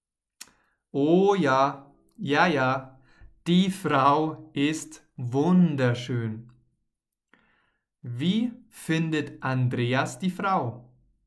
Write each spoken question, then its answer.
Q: Wie findet Andreas die Frau?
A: wunderschön. Andreas findet die Frau wunderschön.